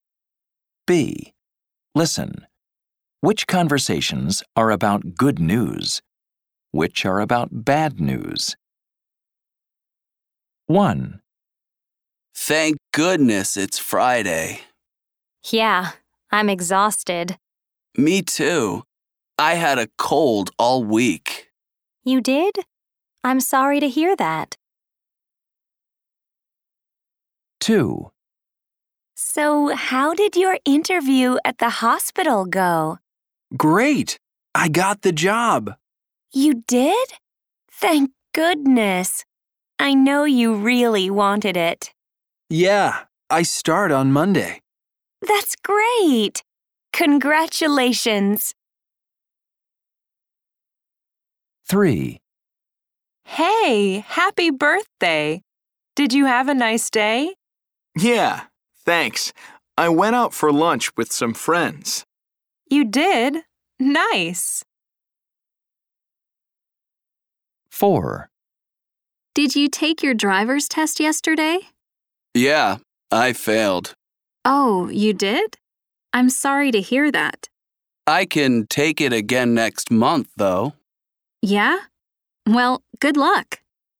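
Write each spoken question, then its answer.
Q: Which conversations are about good news? Which are about bad news?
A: bad news

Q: Which conversations are about good news? Which are about bad news?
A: good news

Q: Which conversations are about good news? Which are about bad news?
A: good news

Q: Which conversations are about good news? Which are about bad news?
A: bad news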